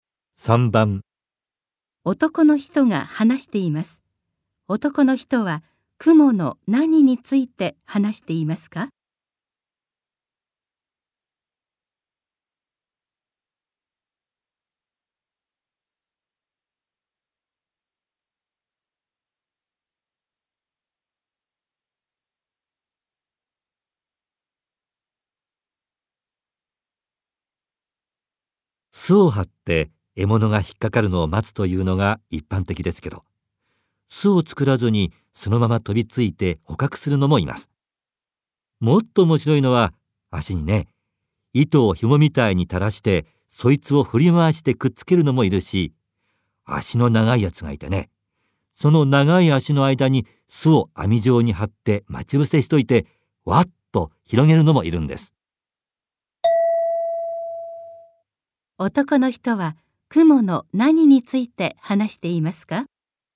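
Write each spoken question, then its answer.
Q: 男の人は雲の何について話していますか?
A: クモの獲物の捕まえ方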